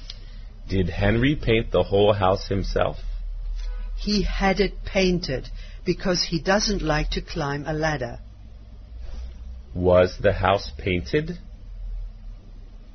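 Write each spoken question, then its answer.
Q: Was the house painted?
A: Yes, but by someone else, not Henry.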